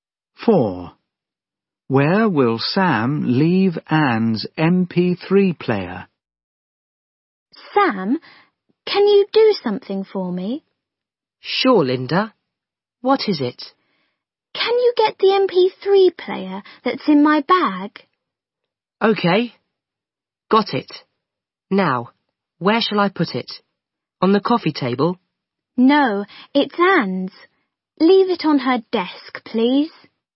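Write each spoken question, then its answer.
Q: Where will Sam leave Anne's MP3 player?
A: On her desk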